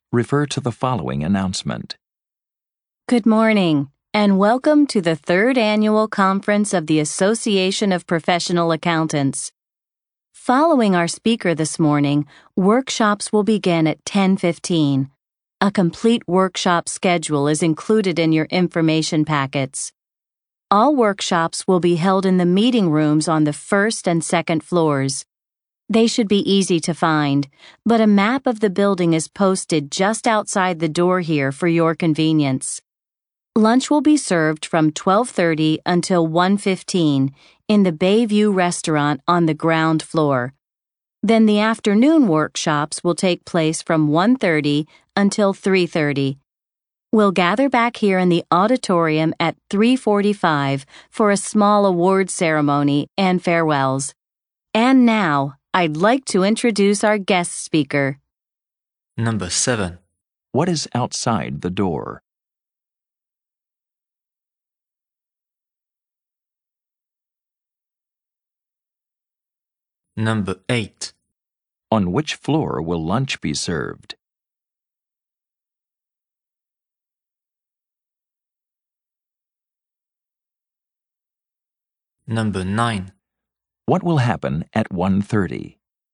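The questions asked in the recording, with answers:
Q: What is outside the door?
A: A map of the building

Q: On which floor will lunch be served?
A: The ground floor

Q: What will happen at 1:30?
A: The afternoon workshops will begin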